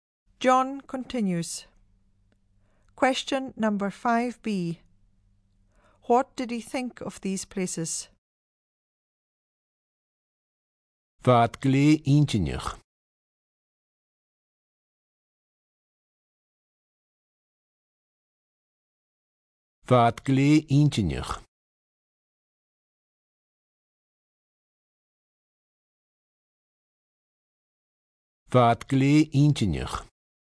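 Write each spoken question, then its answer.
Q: What did he think of these places?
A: Very interesting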